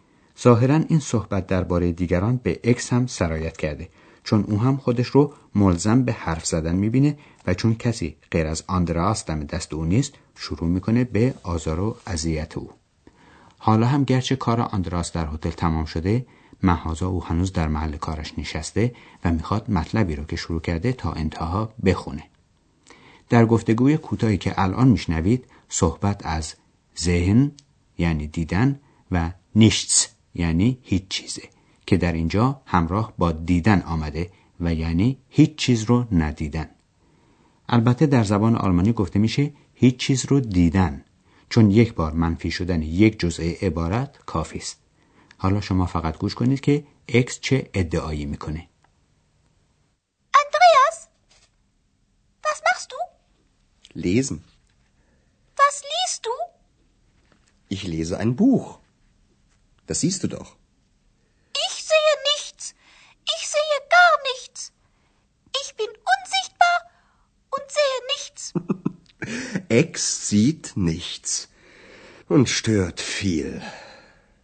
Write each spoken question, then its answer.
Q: حالا شما فقط گوش کنید که اکس چه ادعایی میکنه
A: اکس ادعا میکنه که هیچ چیز رو نمیبینه